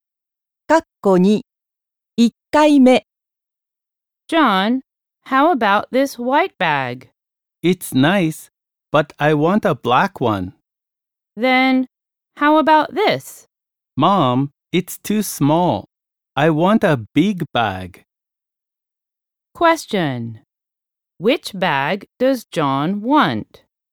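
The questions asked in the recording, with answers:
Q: Which bag does John want?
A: A big black bag.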